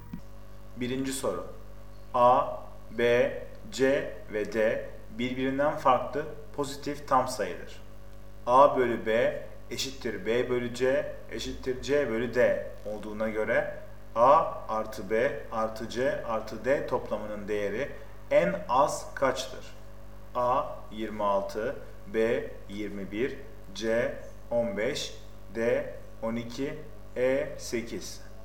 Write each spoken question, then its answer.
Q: A bölü B eşittir B bölü C eşittir C bölü D olduğuna göre A artı B artı C artı D toplamının değeri en az kaçtır?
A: Doğru cevap C 15.